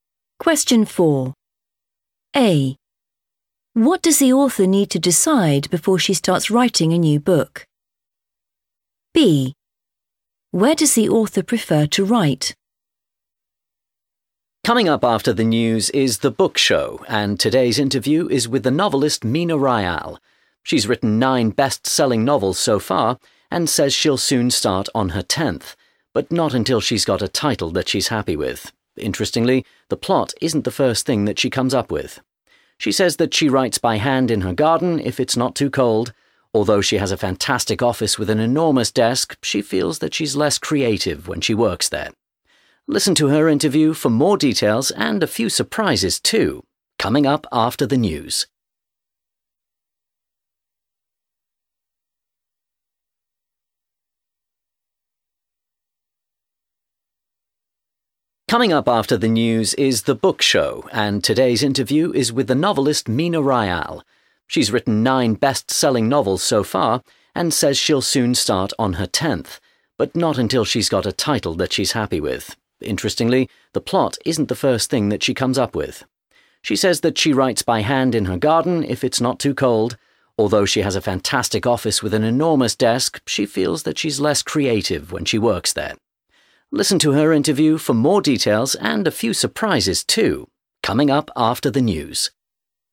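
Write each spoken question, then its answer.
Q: What does the author need to decide before she starts writing a new book?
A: the title

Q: Where does the author prefer to write?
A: in her garden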